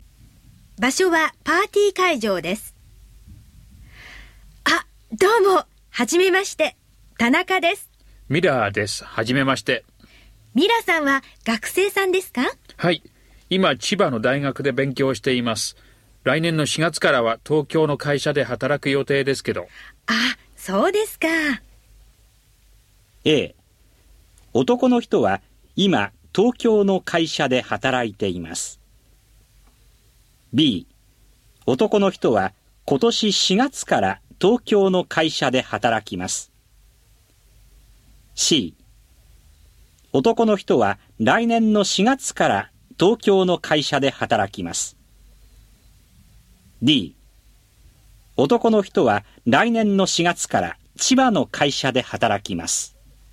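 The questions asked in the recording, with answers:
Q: A、 男の人は今東京の会社で働いています。 B、 男の人は今年4月から東京の会社で働きます。 C、 男の人は来年の4月から東京の会社で働きます。 D、 男の人は来年の4月から千葉の会社で働きます。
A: C: 男の人は来年の4月から東京の会社で働きます。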